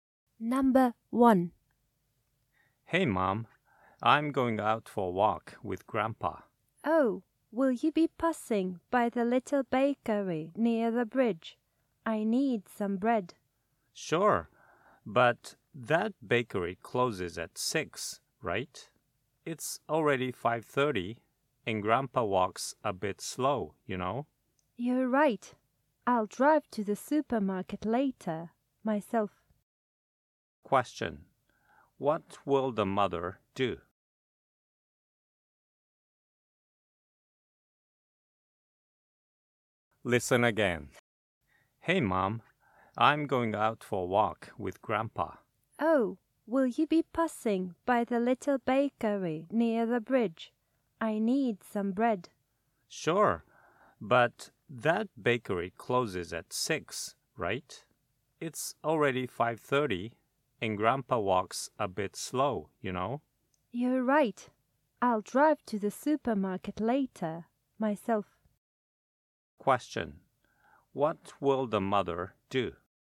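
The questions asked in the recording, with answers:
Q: What will the mother do?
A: Drive to the supermarket later to buy bread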